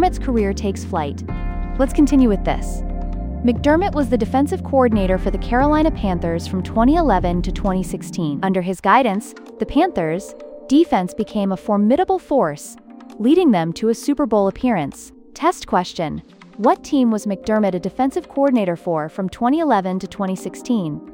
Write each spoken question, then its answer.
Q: What team was McDermott a defensive coordinator for from 2011 to 2016?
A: Correct answer. Carolina Panthers.